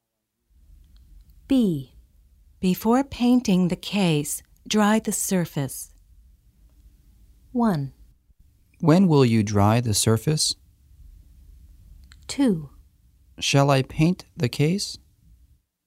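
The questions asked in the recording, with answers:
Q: When will you dry the surface?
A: Before painting the case.

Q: Shall I paint the case?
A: Not yet; dry the surface first.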